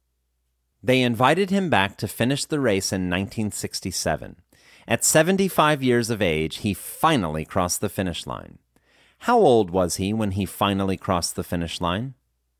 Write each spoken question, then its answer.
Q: How old was he when he finally crossed the finish line?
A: He was 75 years old when he finally crossed the finish line.